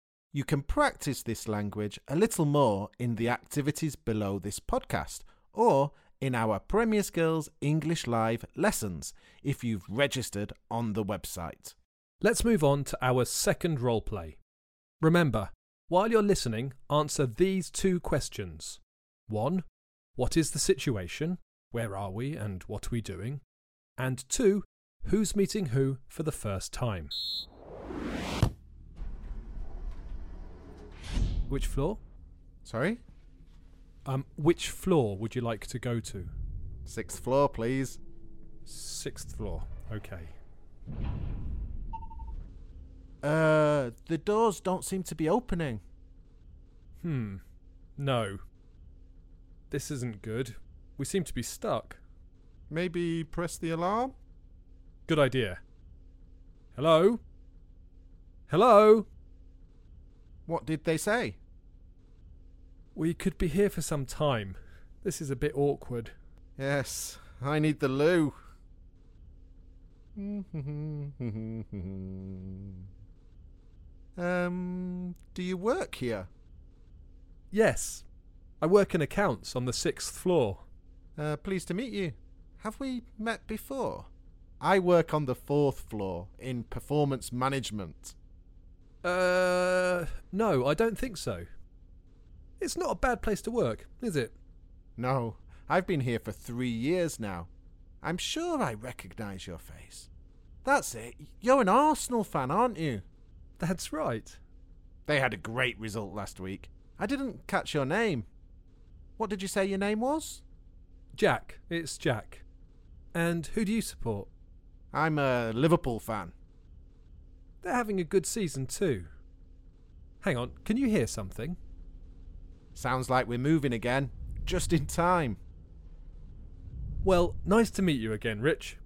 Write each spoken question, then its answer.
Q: What is the situation? Where are we and what are we doing?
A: In this role play, we were stuck in a lift and we started to make small talk.